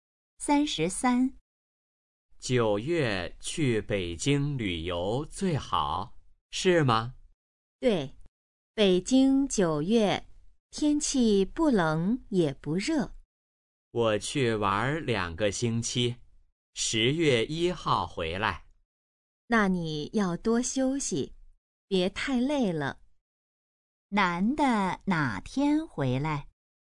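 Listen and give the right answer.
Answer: 10月1号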